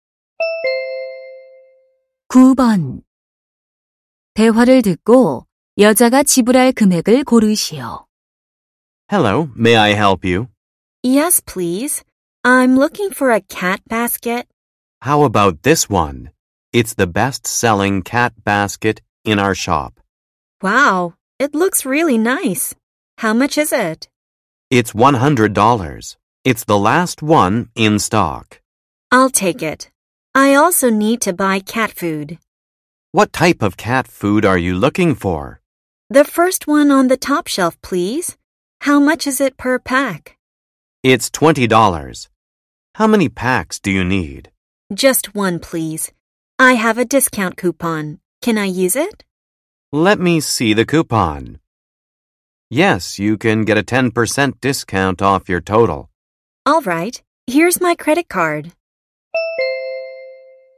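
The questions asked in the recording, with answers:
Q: 대화를 듣고 여자가 지불할 금액을 고르시오.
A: 108달러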